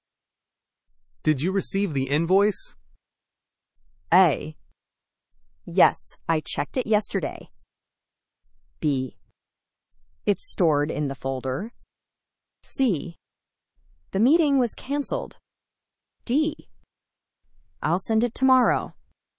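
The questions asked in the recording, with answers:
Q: Did you receive the invoice?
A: A: Yes, I checked it yesterday.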